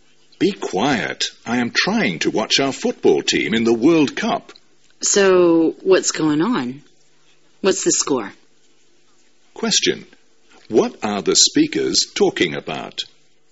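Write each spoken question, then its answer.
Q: What are the speakers talking about?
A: A World Cup football match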